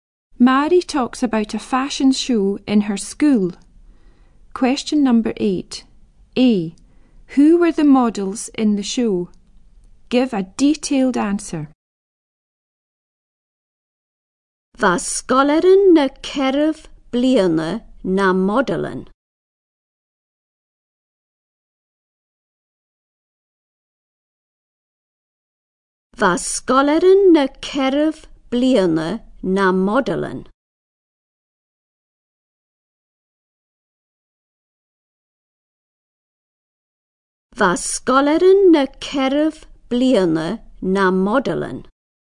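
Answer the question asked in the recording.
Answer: Fourth-year pupils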